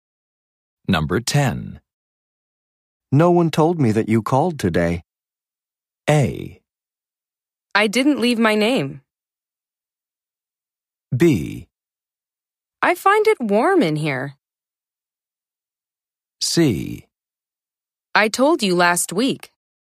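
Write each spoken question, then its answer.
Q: No one told me that you called today.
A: A: I didn't leave my name.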